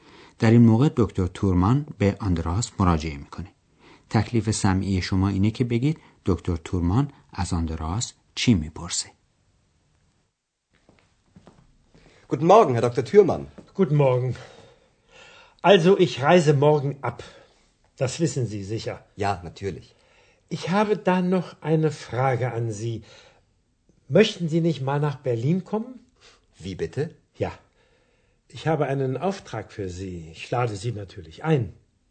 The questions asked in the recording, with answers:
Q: تکلیف سمعی شما اینه که بگید دکتر تورمان از آندراس چی میپرسه؟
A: از آندراس میپرسه که آیا ملدار زمانی سفری به برلین بکنه